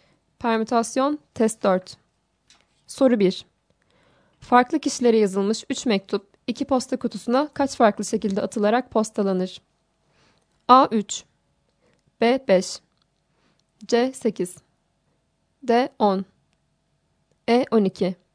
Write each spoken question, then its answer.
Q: Farklı kişilere yazılmış 3 mektup 2 posta kutusuna kaç farklı şekilde atılarak postalanır?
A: Doğru cevap C şıkkı.